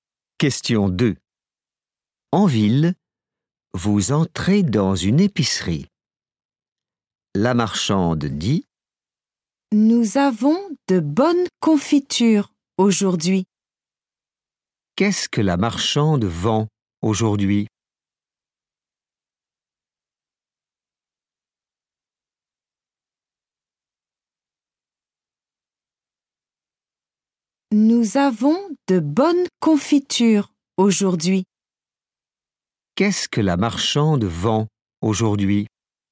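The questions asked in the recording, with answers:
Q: Qu'est-ce que la marchande vend aujourd'hui ?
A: de la confiture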